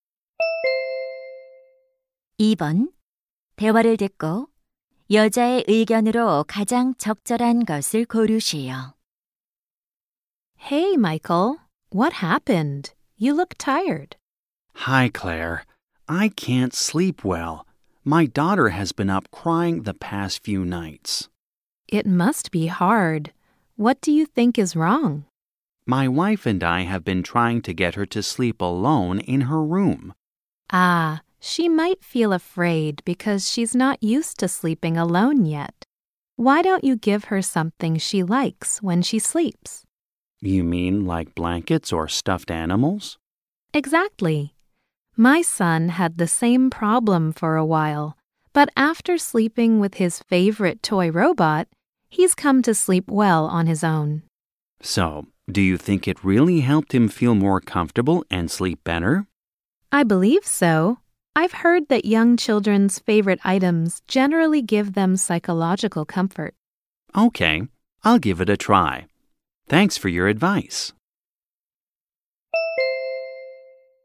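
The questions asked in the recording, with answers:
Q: 대화를 듣고 여자의 의견으로 가장 적절한 것을 고르시오.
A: 아이가 좋아하는 물건은 아이가 혼자 편안하게 자는 데 도움이 된다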